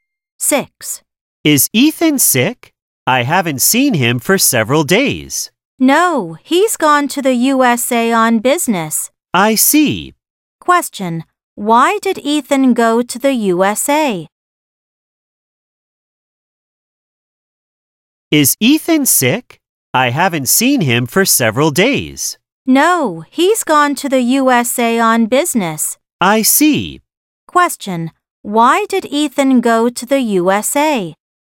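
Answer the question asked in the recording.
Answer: On business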